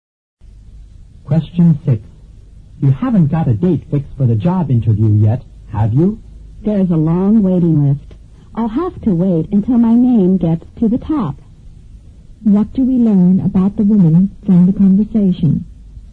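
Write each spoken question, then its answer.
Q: What do we learn about the woman from the conversation?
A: She has no interview date yet and is on a long waiting list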